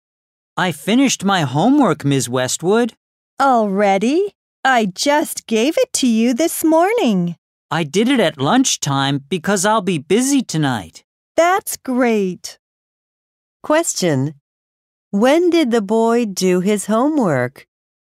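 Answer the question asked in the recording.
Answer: At lunchtime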